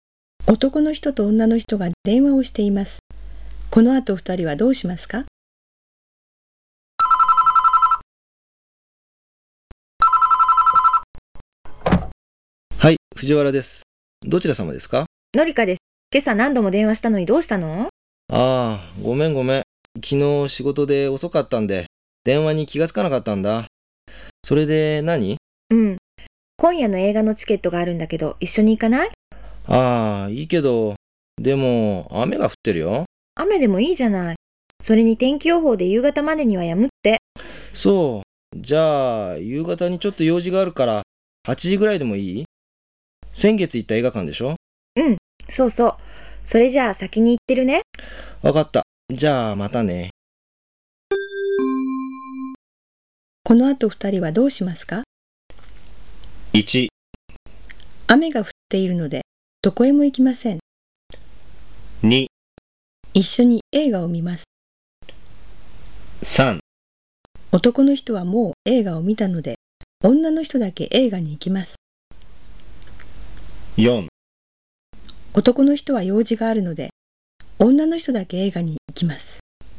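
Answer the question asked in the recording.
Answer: 2: 一緒に映画を見ます。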